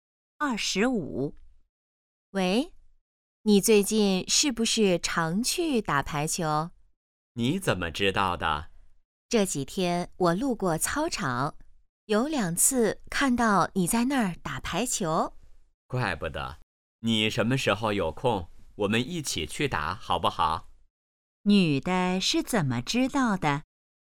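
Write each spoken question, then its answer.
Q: 女的是怎么知道的?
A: 路过操场时看到他在打排球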